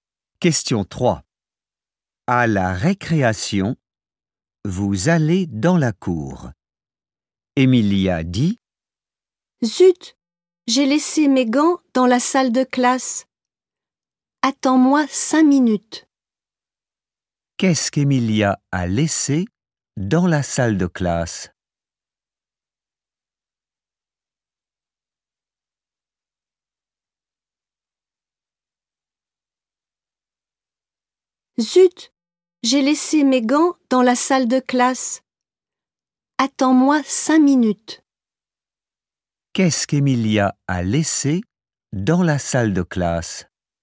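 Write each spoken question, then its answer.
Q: Qu'est-ce qu'Emilia a laissé dans la salle de classe ?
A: Ses gants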